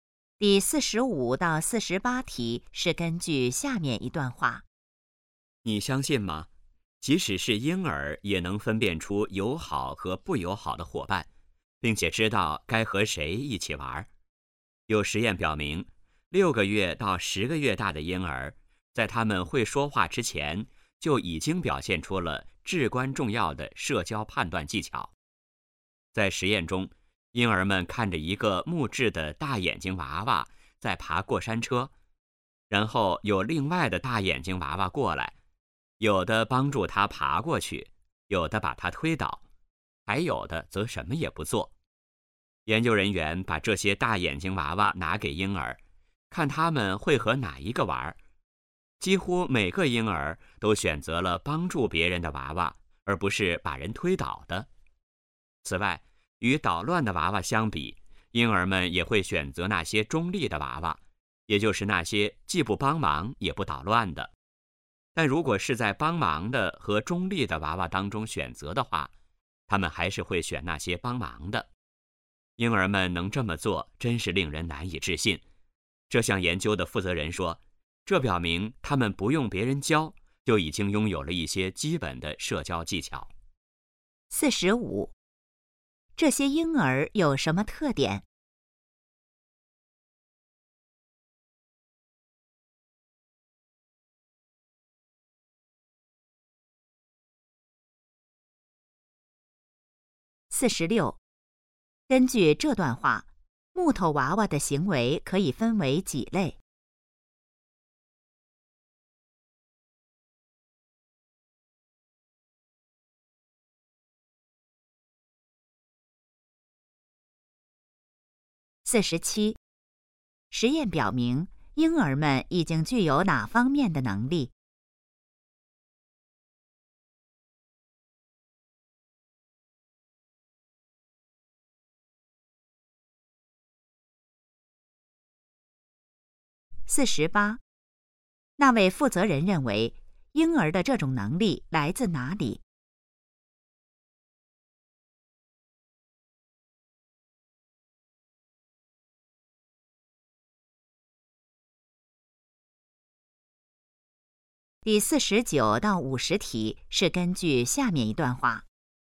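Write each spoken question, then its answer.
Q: 根据这段话,木头娃娃的行为可以分为几类?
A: 三类

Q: 实验表明,婴儿们已经具有哪方面的能力?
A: 社交判断能力

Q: 那位负责人认为,婴儿的这种能力来自哪里?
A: 天生的,不用别人教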